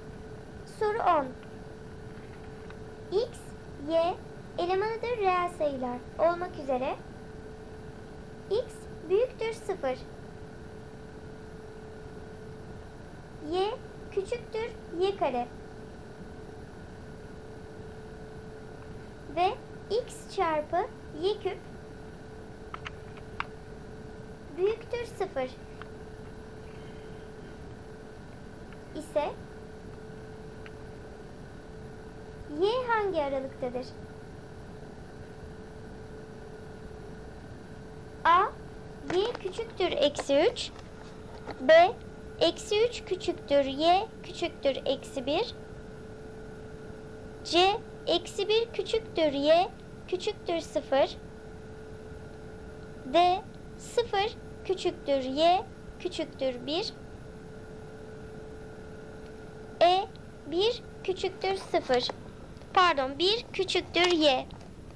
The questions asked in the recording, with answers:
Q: Y hangi aralıktadır?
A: Doğru cevap E seçeneği. 1 küçüktür y.